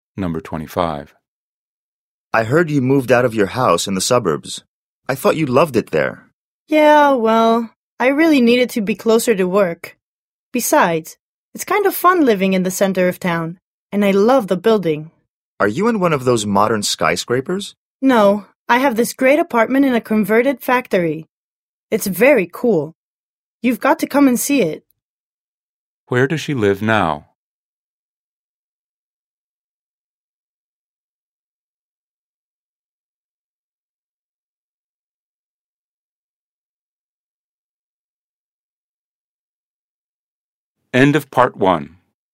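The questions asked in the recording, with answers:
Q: Where does she live now?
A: In an apartment in a converted factory in the center of town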